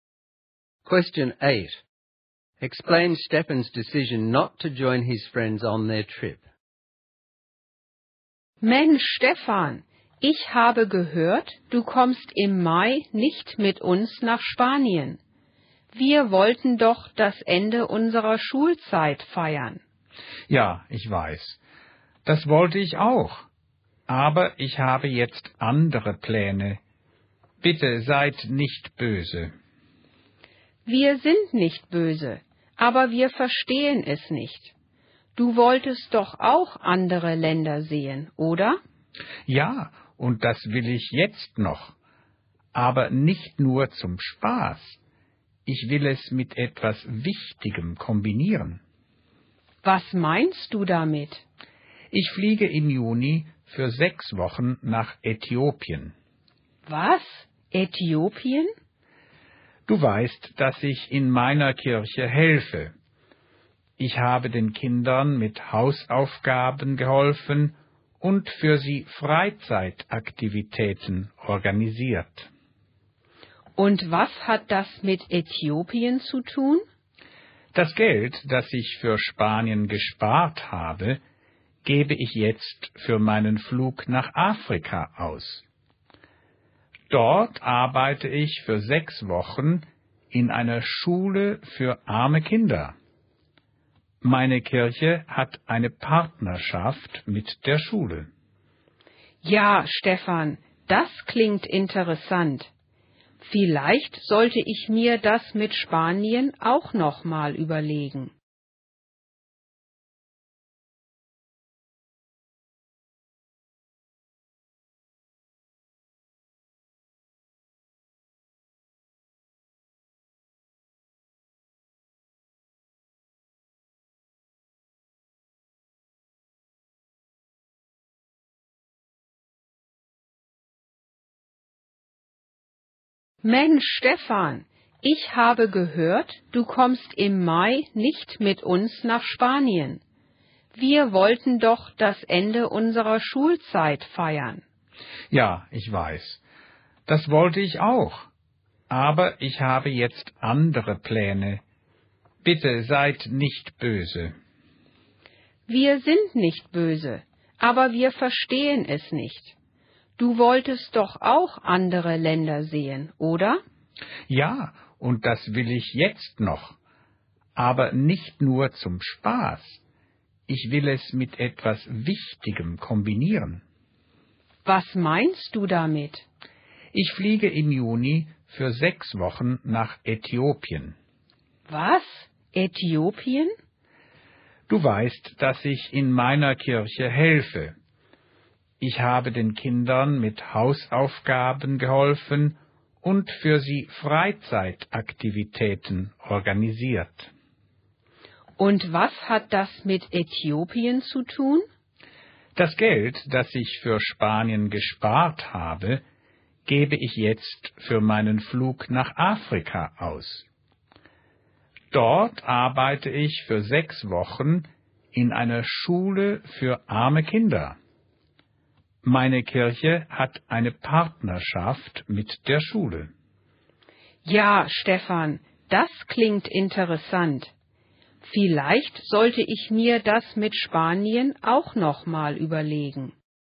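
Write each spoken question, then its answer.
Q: Explain Stefan's decision not to join his friends on their trip.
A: He wants to travel for something important: he'll use his savings to fly to Ethiopia for 6 weeks to work in a school for poor children partnered with his church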